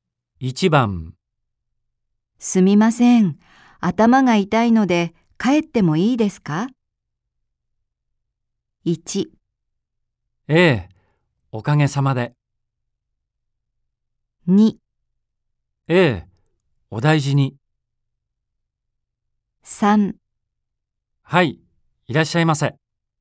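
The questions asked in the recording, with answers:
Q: すみません。頭が痛いので帰ってもいいですか?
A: 2: ええ、お大事に。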